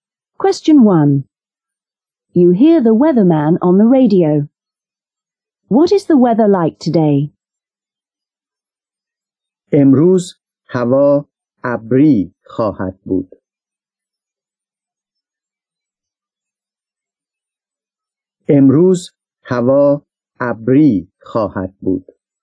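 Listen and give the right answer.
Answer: It will be cloudy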